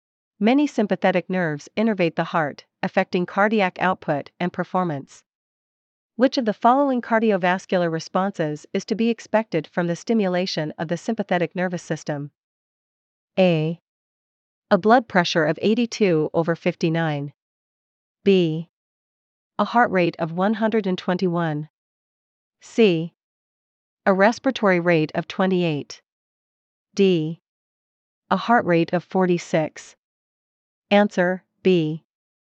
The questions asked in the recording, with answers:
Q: Which of the following cardiovascular responses is to be expected from the stimulation of the sympathetic nervous system?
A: Answer B.